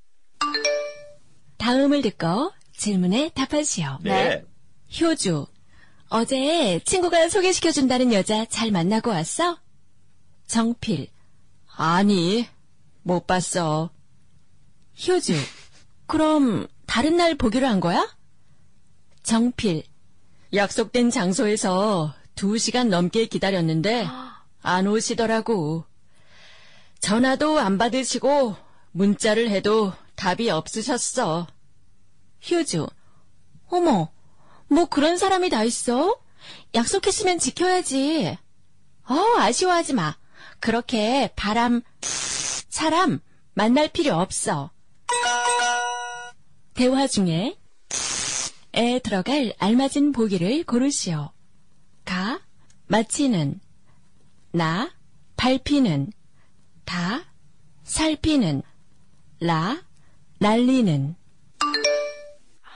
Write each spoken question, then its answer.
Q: 대화 중에 에 들어갈 알맞은 보기를 고르시오.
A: I think all of them would choose 가, because that's the right answer.